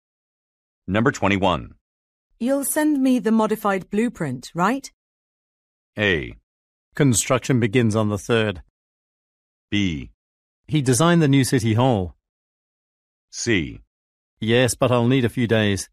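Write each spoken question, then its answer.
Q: You'll send me the modified blueprint, right?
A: C: Yes, but I'll need a few days.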